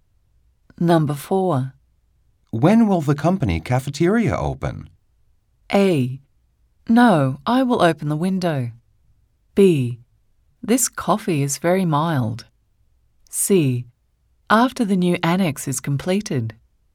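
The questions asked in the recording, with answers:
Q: When will the company cafeteria open?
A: C: After the new annex is completed.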